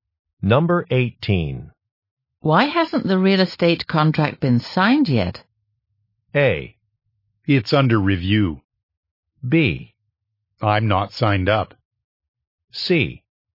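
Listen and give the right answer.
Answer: A: It's under review.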